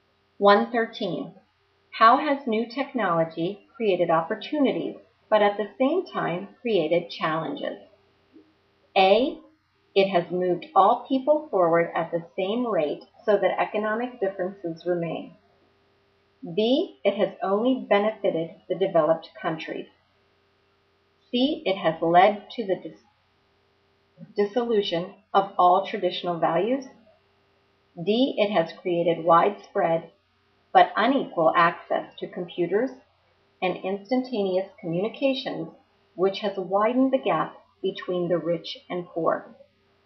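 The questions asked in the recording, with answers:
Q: How has new technology created opportunities, but at the same time created challenges?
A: D: It has created widespread but unequal access to computers, and instantaneous communications, which has widened the gap between the rich and poor.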